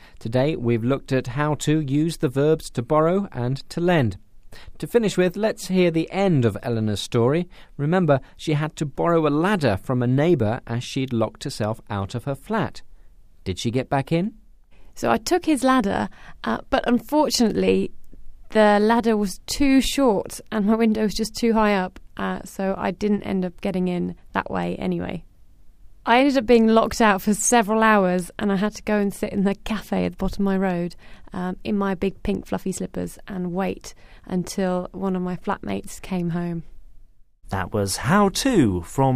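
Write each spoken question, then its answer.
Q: Did she get back in?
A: No, the ladder was too short; she waited for a flatmate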